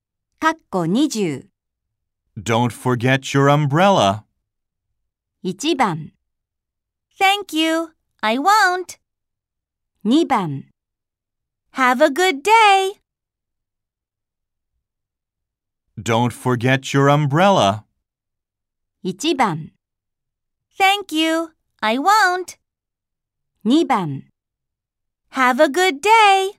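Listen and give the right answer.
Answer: 1: Thank you, I won't.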